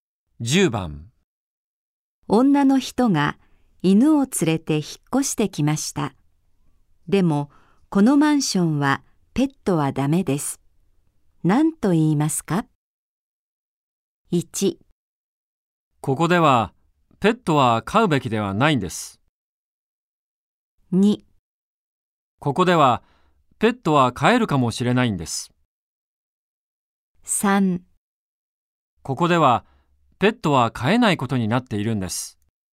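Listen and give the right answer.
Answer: 3: ここではペットは飼えないことになっているんです。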